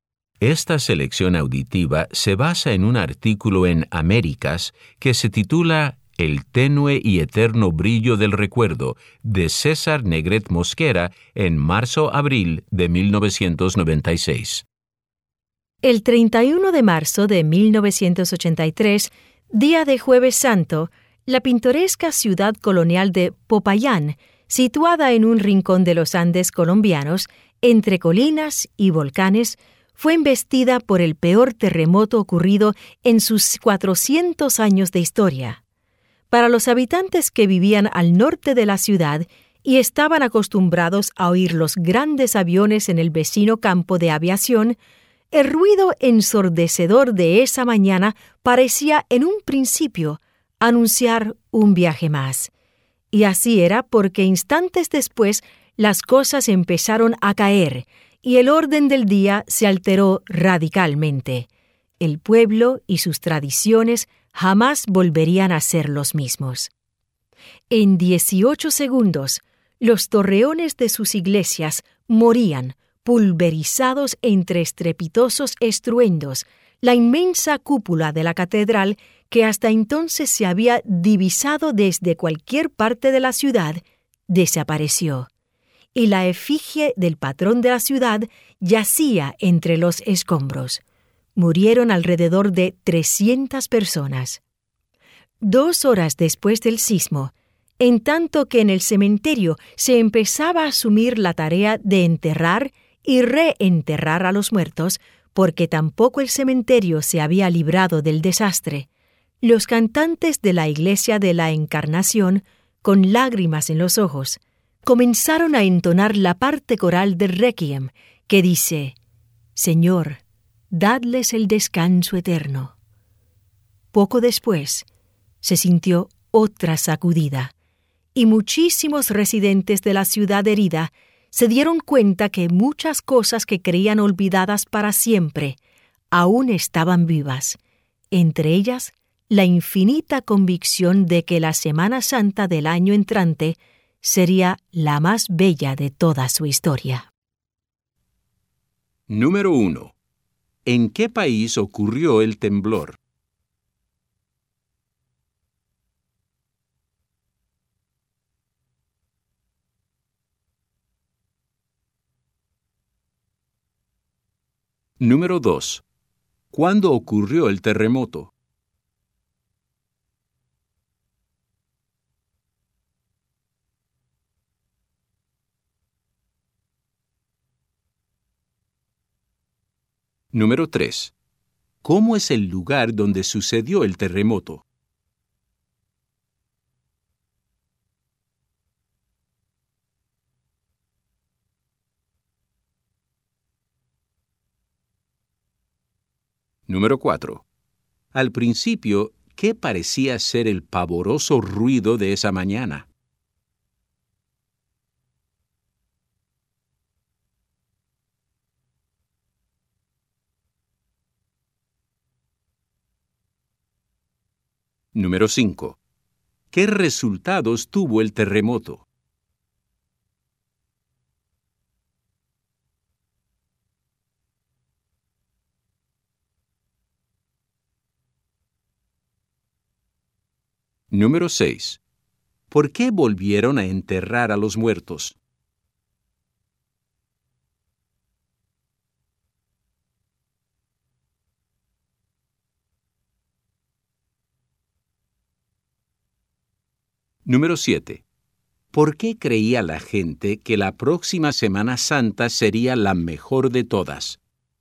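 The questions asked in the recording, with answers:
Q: ¿En qué país ocurrió el temblor?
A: En Colombia

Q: ¿Cuándo ocurrió el terremoto?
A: El 31 de marzo de 1983, Jueves Santo

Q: ¿Cómo es el lugar donde sucedió el terremoto?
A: Una pintoresca ciudad colonial en los Andes, entre colinas y volcanes

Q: Al principio, ¿qué parecía ser el pavoroso ruido de esa mañana?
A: El ruido de un avión grande que salía de viaje

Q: ¿Qué resultados tuvo el terremoto?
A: Destruyó iglesias y la cúpula de la catedral y murieron unas 300 personas

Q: ¿Por qué volvieron a enterrar a los muertos?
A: Porque el terremoto también dañó el cementerio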